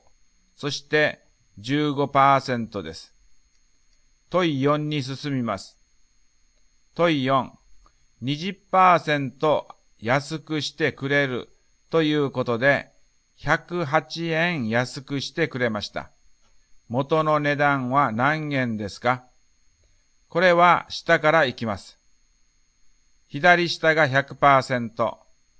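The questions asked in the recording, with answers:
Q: 20% 安くしてくれるということで、108円安くしてくれました。 元の値段は何円ですか?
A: 540円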